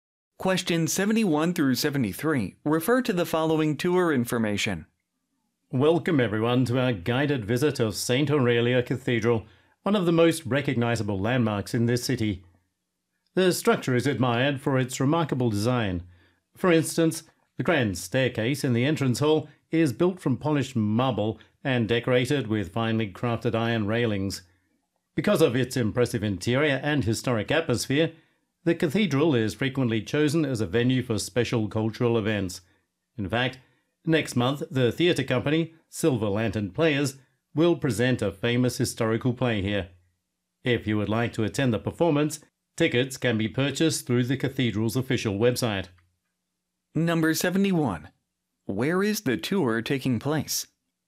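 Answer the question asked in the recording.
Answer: At St. Aurelia Cathedral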